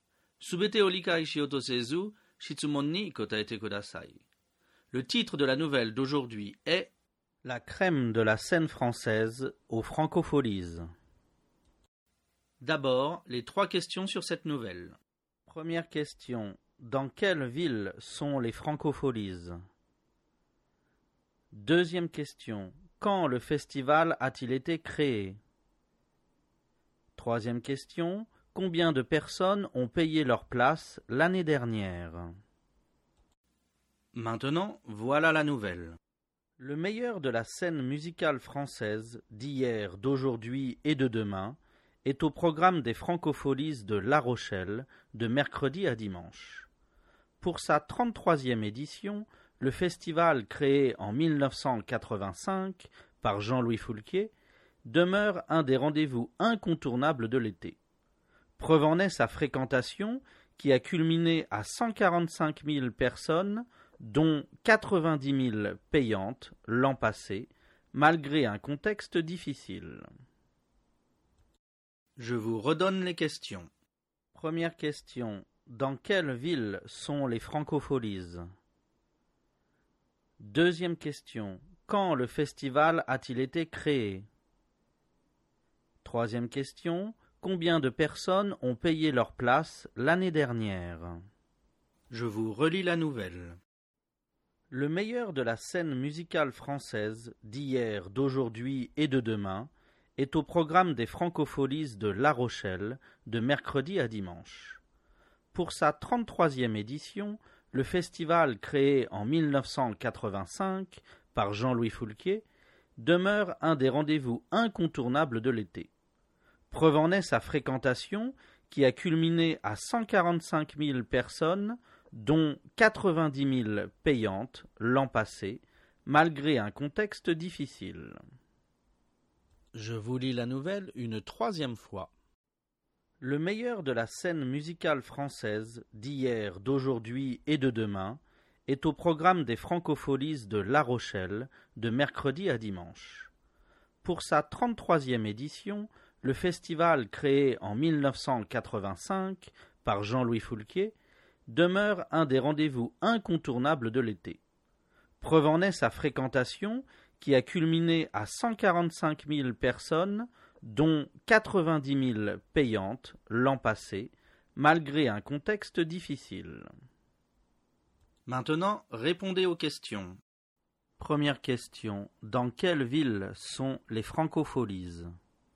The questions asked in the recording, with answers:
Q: dans quelle ville sont les francopholies?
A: Réponse, les francopholies sont à La Rochelle.

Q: quand le festival a-t-il été créé?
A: Réponse, le festival a été créé en 1985.

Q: combien de personnes ont payé leur place l'année dernière?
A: Réponse, 90 000 personnes ont payé leur place l'année dernière.